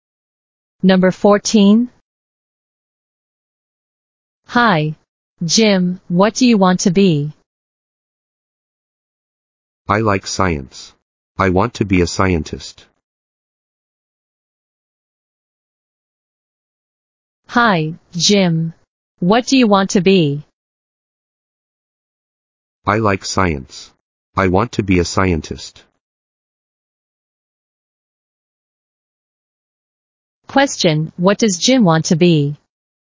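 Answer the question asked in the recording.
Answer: A scientist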